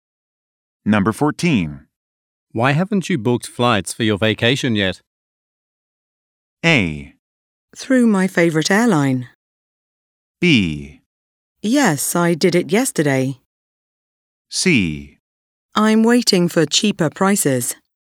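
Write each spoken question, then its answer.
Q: Why haven't you booked flights for your vacation yet?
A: C: I'm waiting for cheaper prices.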